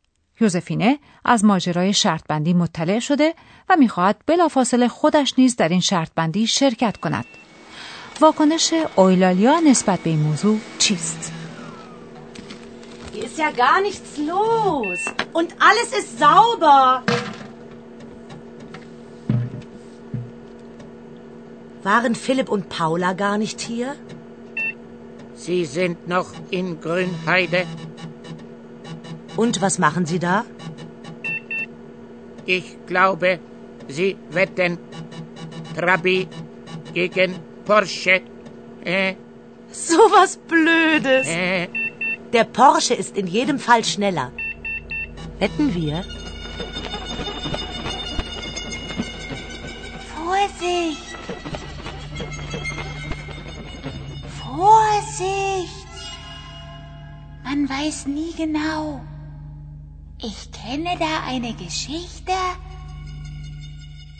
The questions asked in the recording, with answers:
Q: واکنش اویلالیا نسبت به این موضوع چیست؟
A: اما آیلالیا که معتقد است آدمی نمیتواند همه چیز را دقیقا بداند به یوزفینه گوشزد می کند جانب احتیاط را از دست ندهد